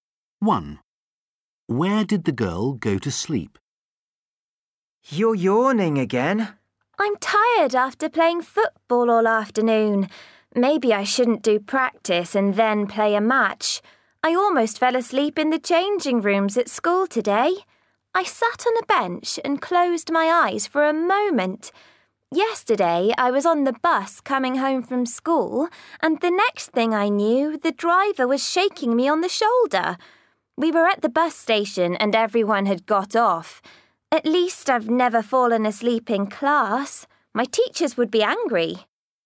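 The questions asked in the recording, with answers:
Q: Where did the girl go to sleep?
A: On the bus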